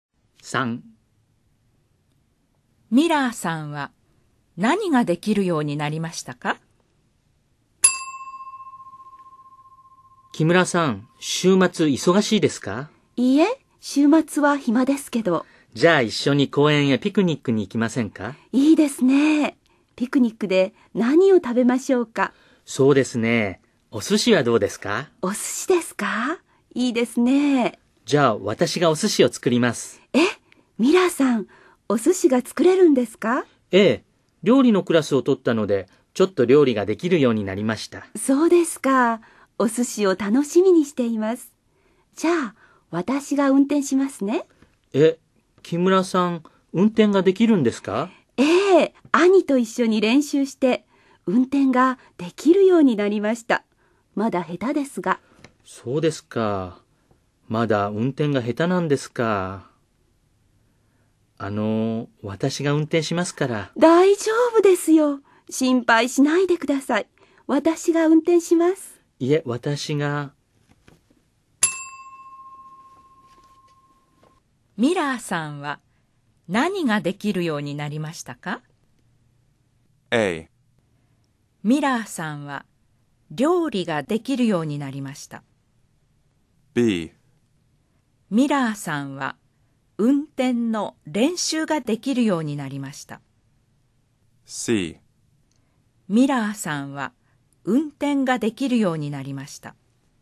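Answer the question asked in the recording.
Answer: A: ミラーさんは料理ができるようになりました。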